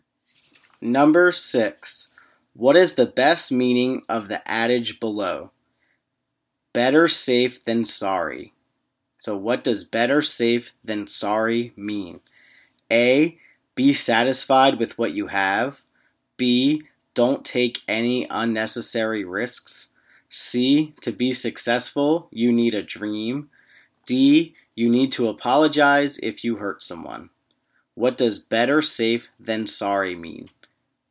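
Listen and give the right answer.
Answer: B: Don't take any unnecessary risks.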